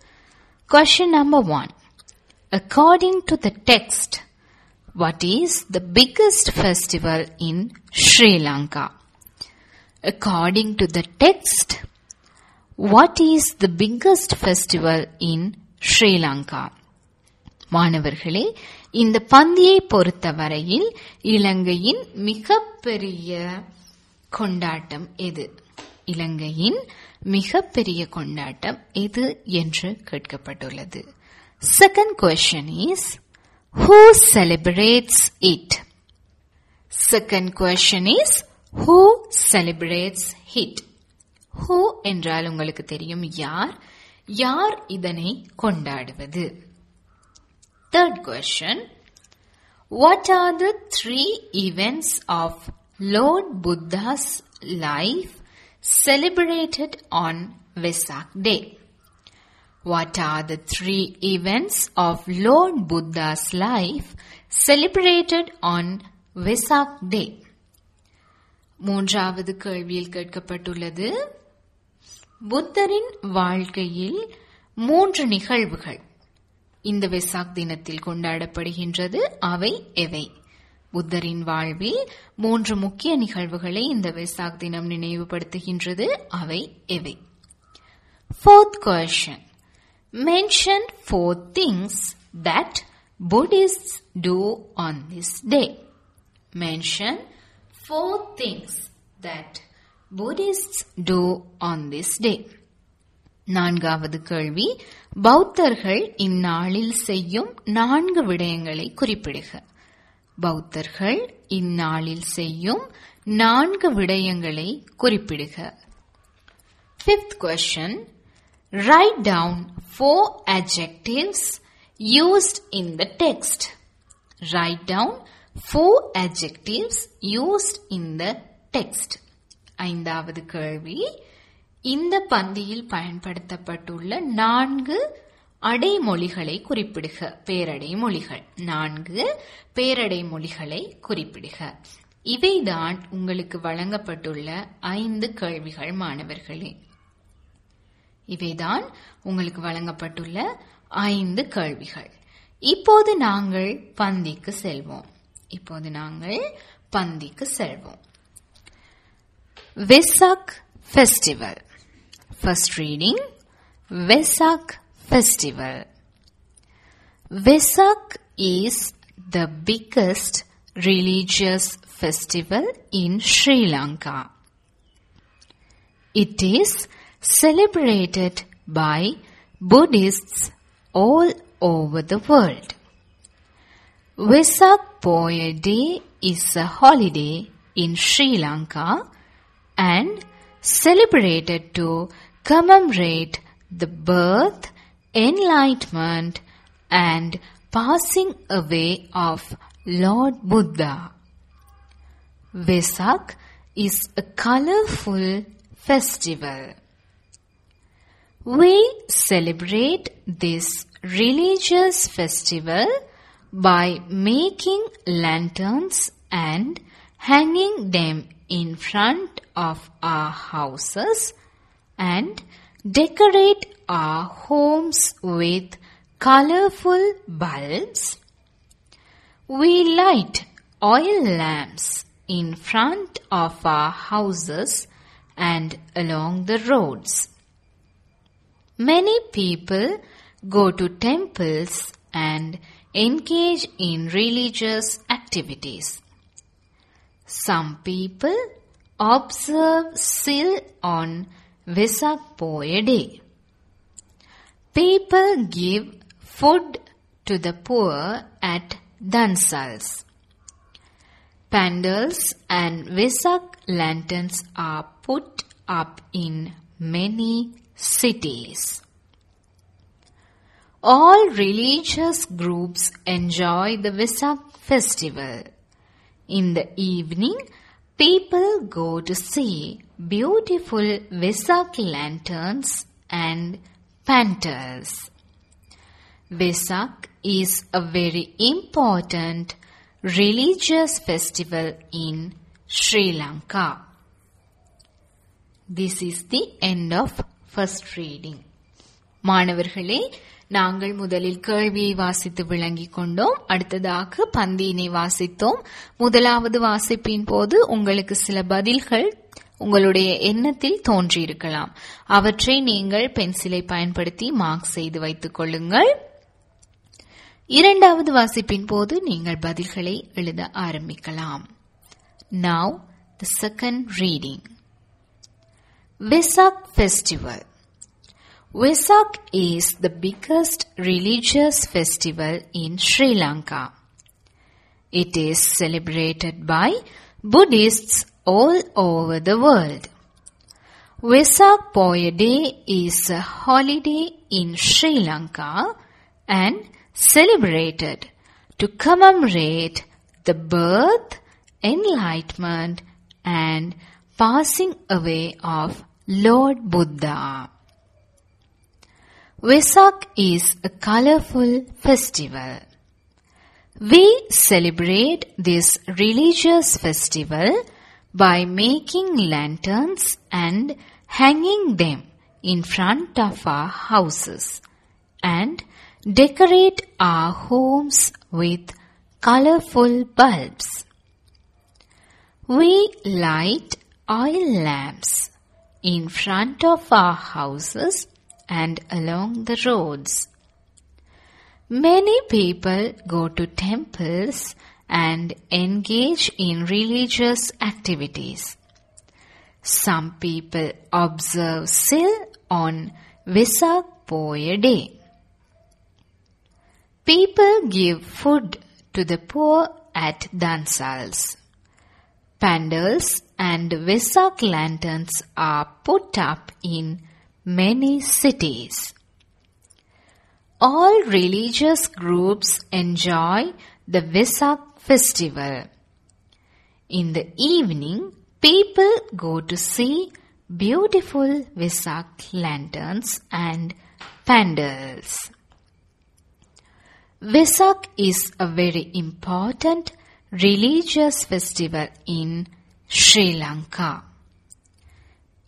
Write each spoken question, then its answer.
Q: According to the text, what is the biggest festival in Sri Lanka?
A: Vesak is the biggest religious festival in Sri Lanka.

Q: who celebrates it?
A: It is celebrated by Buddhists all over the world.

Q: What are the three events of Lord Buddha's life celebrated on Vesak Day?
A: The birth, enlightenment and passing away of Lord Buddha are celebrated on Vesak Day.

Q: Mention four things that Buddhists do on this day.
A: Making lanterns and hanging them in front of houses.

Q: Write down four adjectives used in the text.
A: Biggest, colorful, beautiful and religious.